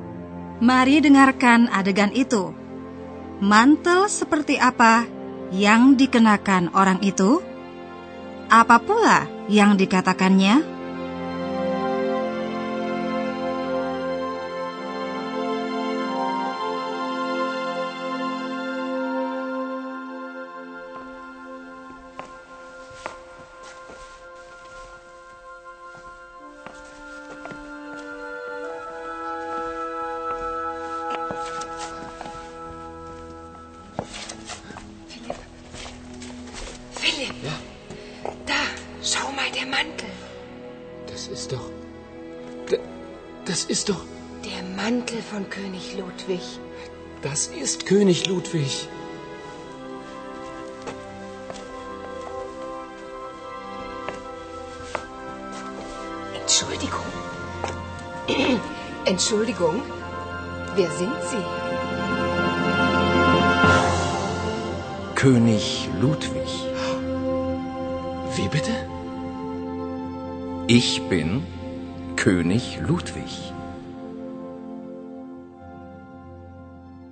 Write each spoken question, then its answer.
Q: Apa pula yang dikatakannya?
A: orang itu menyatakan bahwa dia sendirilah Raja Ludwig